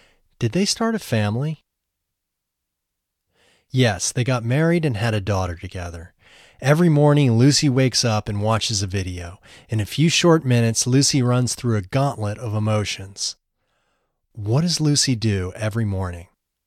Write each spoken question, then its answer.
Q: What does Lucy do every morning?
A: Every morning, she wakes up and watches a video.